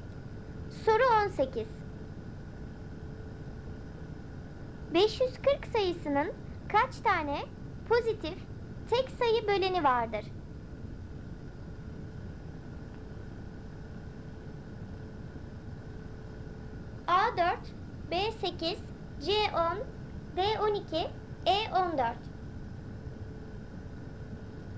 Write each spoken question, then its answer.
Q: 540 sayısının kaç tane pozitif tek sayı böleni vardır?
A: Doğru cevap B8.